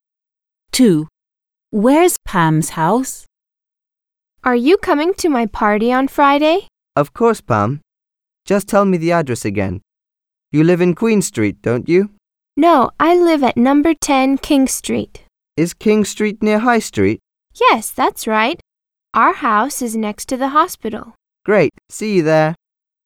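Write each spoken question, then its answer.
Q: Where's Pam's house?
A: number 10 King Street, next to the hospital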